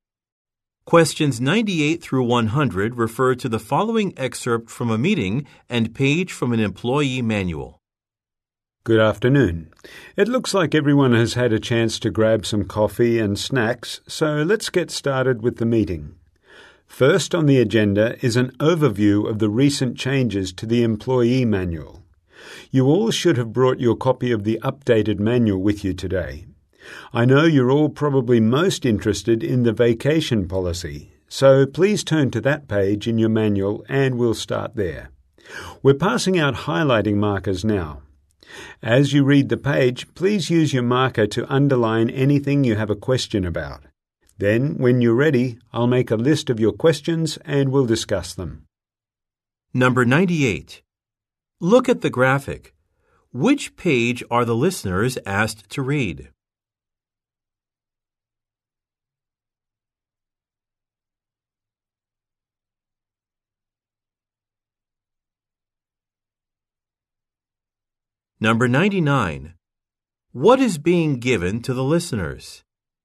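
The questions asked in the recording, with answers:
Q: What is being given to the listeners?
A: Highlighting markers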